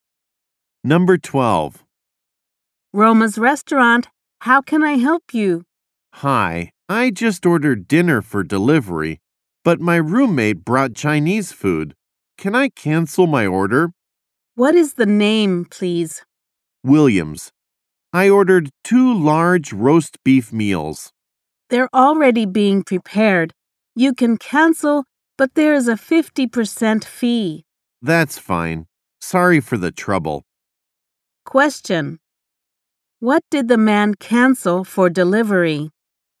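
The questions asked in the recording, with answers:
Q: What did the man cancel for delivery?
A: Two large roast beef meals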